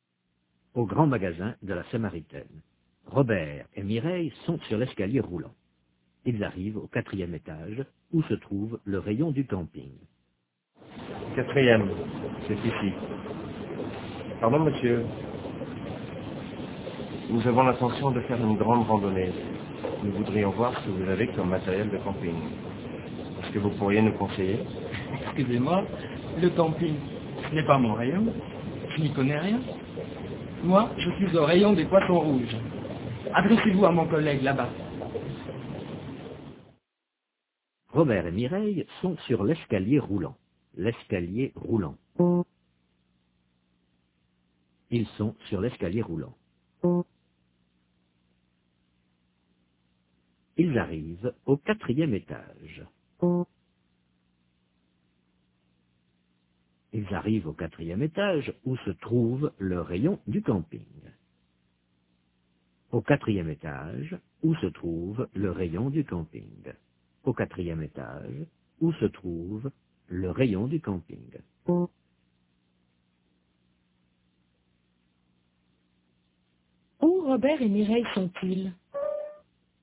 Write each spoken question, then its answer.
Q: Où Robert et Mireille sont-ils?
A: Au grand magasin de la Samaritaine, sur l'escalier roulant.